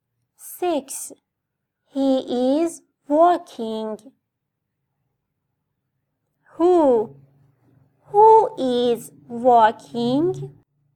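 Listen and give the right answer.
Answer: he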